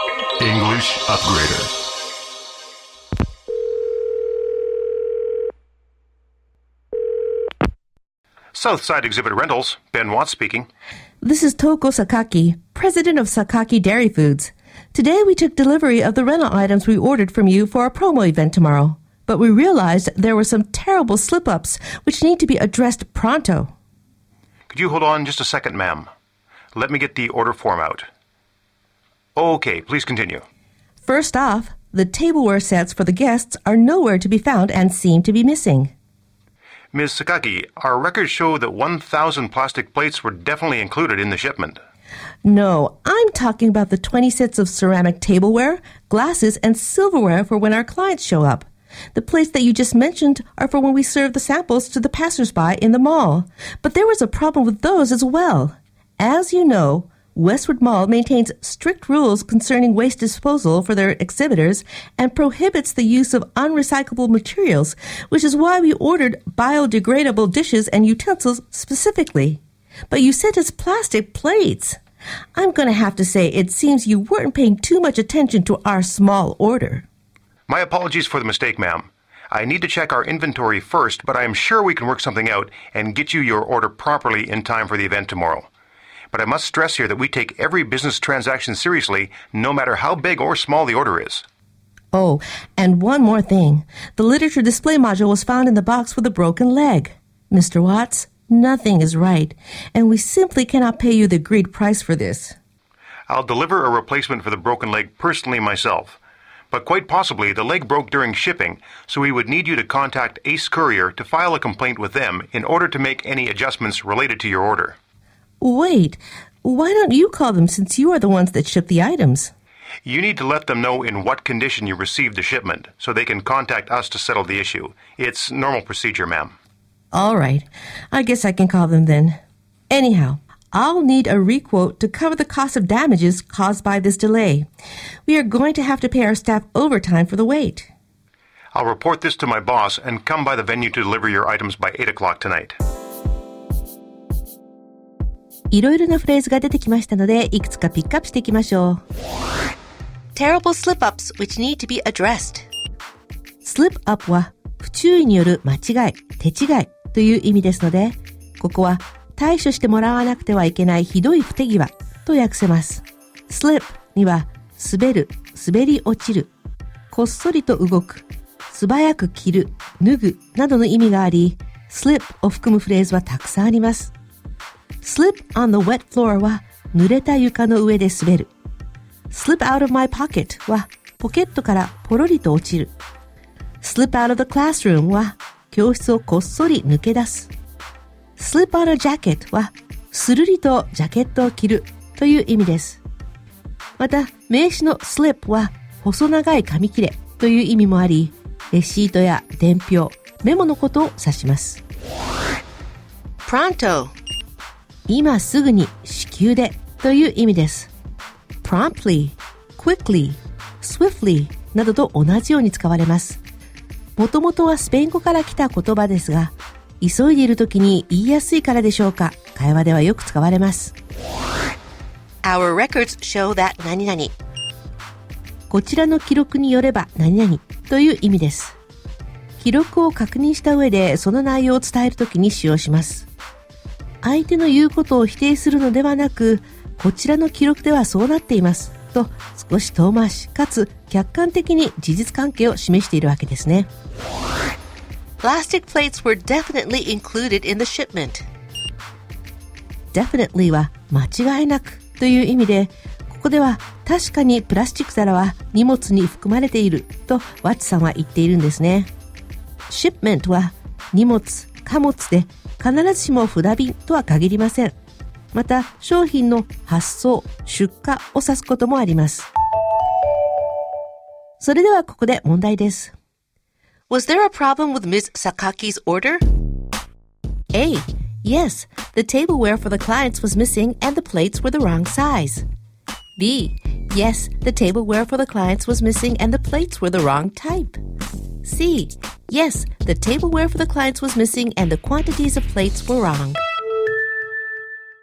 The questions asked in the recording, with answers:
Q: Was there a problem with Ms. Sakaki's order? A. Yes, the tableware for the clients was missing and the plates were the wrong size. B. Yes, the tableware for the clients was missing and the plates were the wrong type. C. Yes, the tableware for the clients was missing and the quantities of plates were wrong.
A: したがって正解は B です。